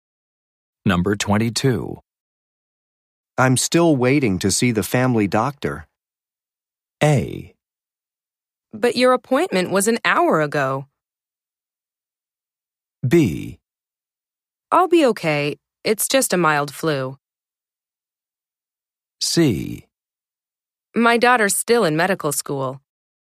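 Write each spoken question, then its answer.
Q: I'm still waiting to see the family doctor.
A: A: But your appointment was an hour ago.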